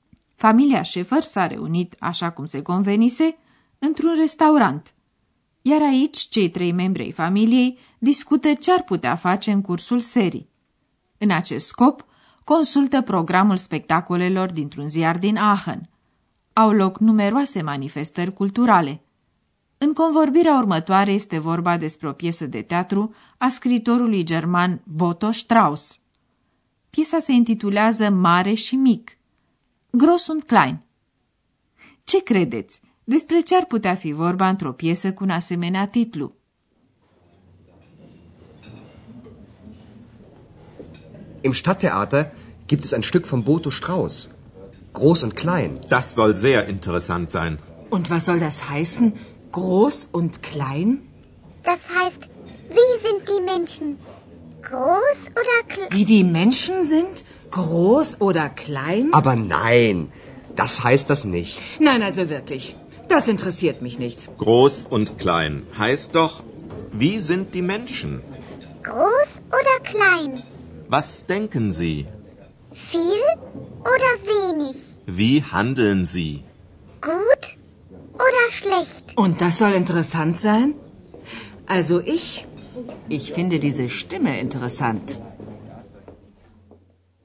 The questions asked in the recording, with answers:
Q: Despre ce ar putea fi vorba într-o piesă cu un asemenea titlu?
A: Mare și mic nu se referă la statura oamenilor, ci la caracterul lor, la felul cum gândesc și acționează.